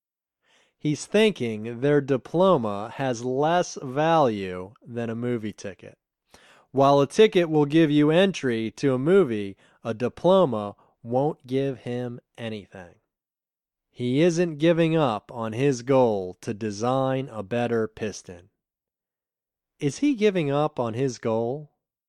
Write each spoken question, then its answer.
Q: Is he giving up on his goal?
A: No, he isn't giving up on his goal.